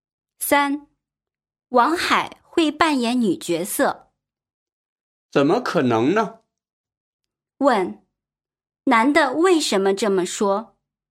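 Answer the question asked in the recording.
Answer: 他不相信王海会扮演女角色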